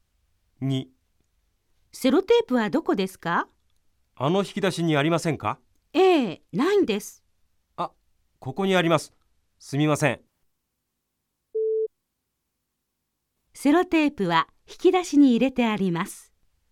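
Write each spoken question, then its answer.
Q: セロテープは引き出しに入れてあります。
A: ×(正しくない)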